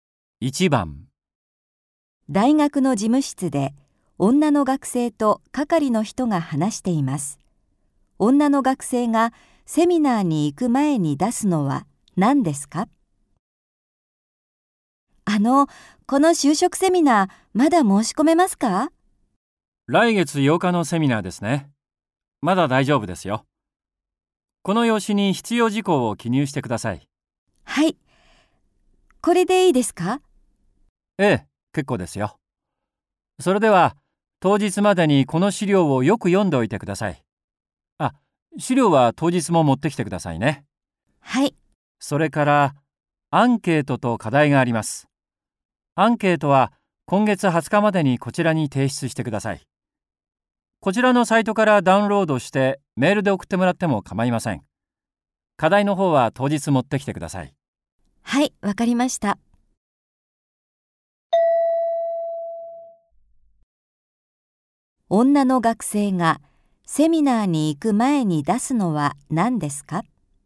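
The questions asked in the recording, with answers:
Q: 女の学生がセミナーに行く前に出すのは何ですか?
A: アンケート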